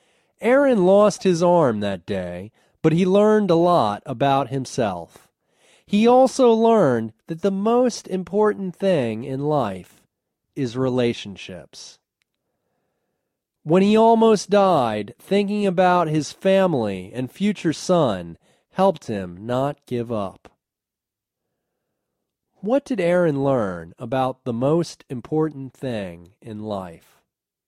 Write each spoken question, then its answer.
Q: What did Aaron learn about the most important thing in life?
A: The most important thing in life is relationships.